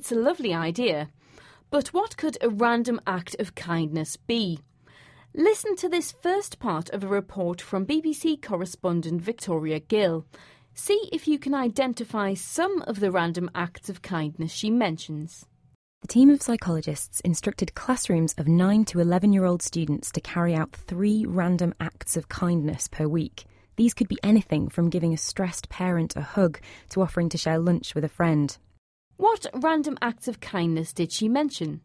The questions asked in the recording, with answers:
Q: What random acts of kindness did she mention?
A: The first example given was giving a stressed parent a hug.